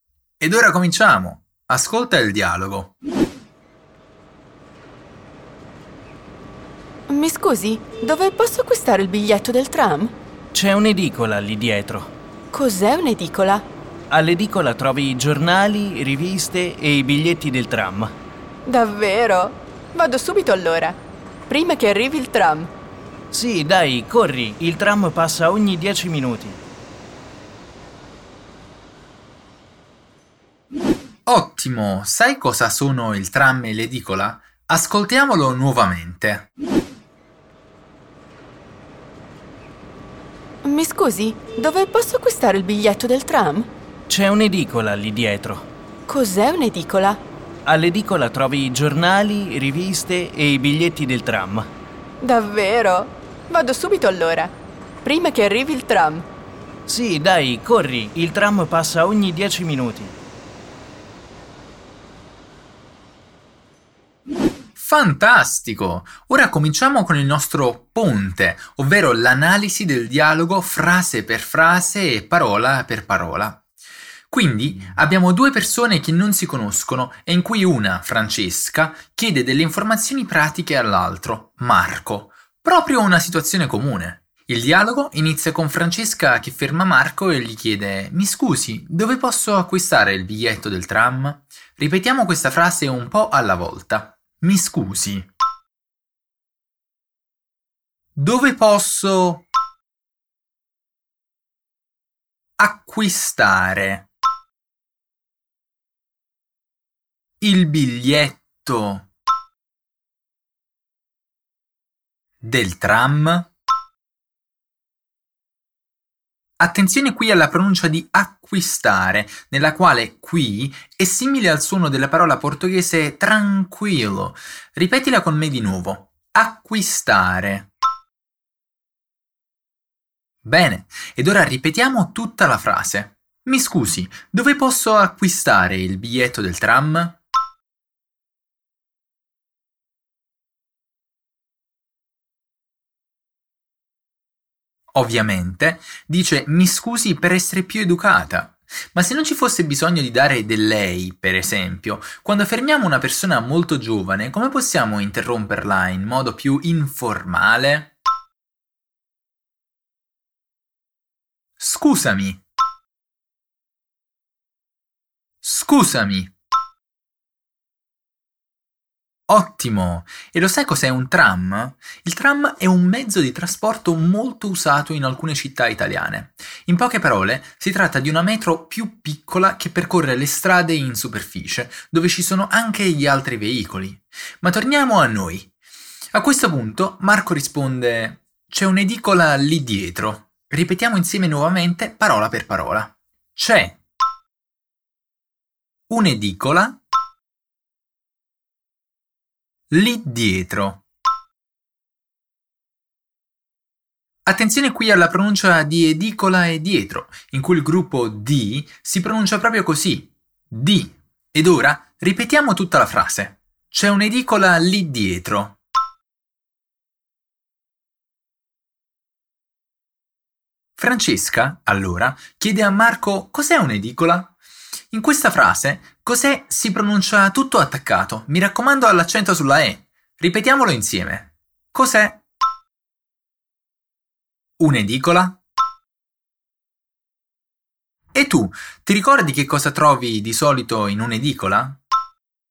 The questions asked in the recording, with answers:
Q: E tu, ti ricordi che cosa trovi di solito in un'edicola?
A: Giornali, riviste e biglietti del tram.